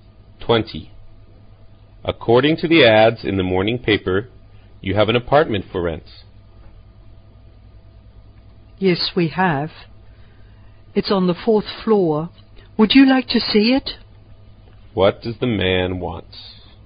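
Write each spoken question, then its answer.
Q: What does the man want?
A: To rent an apartment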